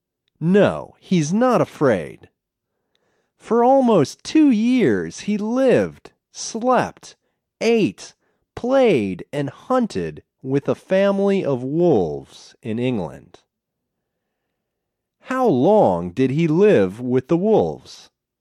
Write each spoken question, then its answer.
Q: How long did he live with the wolves?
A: He lived with them for almost 2 years.